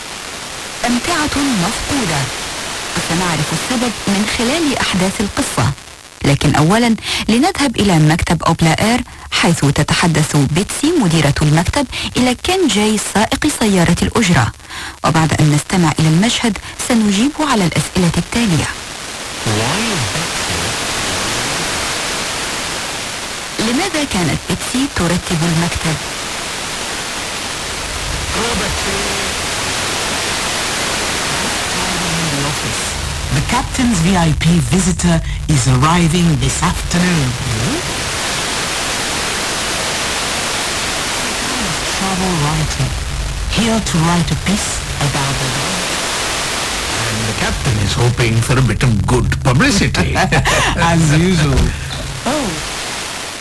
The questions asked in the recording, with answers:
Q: لماذا كانت بيتسي ترتب المكتب؟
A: Because a VIP visitor is arriving this afternoon.